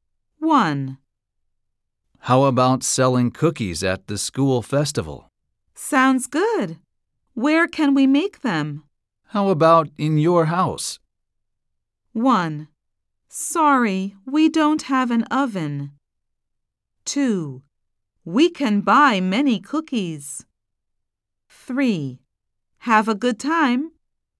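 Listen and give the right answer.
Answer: 1: Sorry, we don't have an oven.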